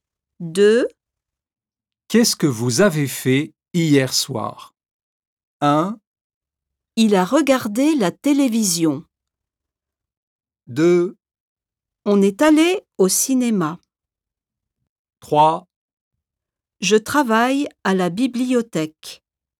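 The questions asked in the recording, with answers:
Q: Qu'est-ce que vous avez fait hier soir?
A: 2: On est allé au cinéma.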